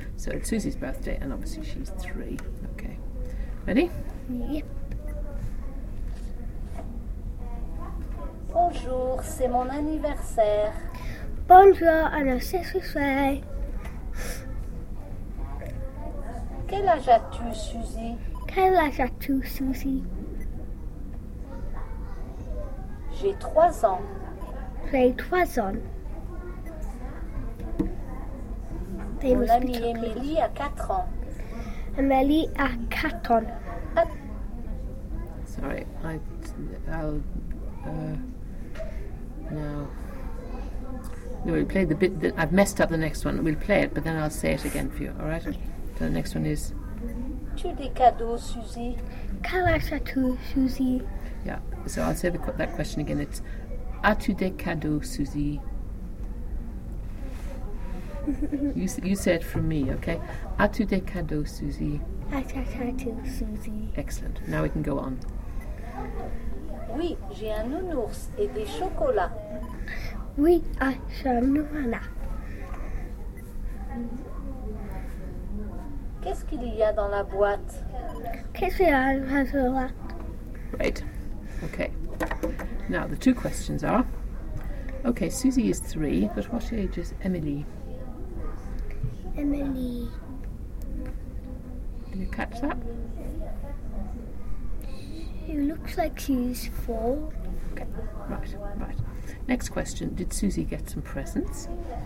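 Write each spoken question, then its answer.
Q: did Susie get some presents?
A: Yes, a teddy bear and chocolates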